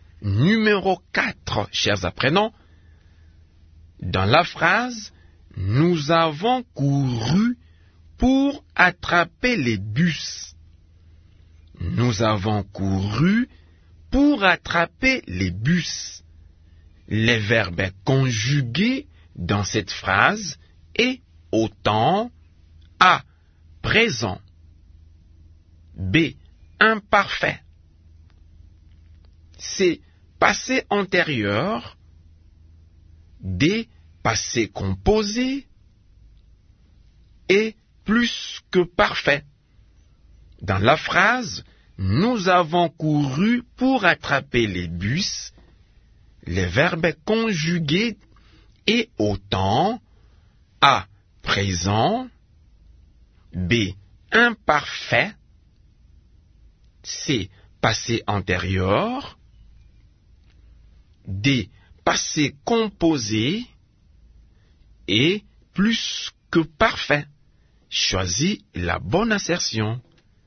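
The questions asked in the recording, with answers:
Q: Les verbes conjugués dans cette phrase est au temps A.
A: D: Passé composé.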